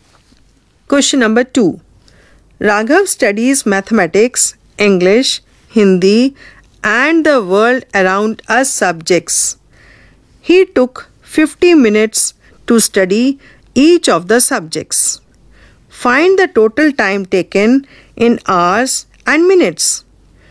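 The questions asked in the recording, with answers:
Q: Find the total time taken in hours and minutes.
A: 3 hours 20 minutes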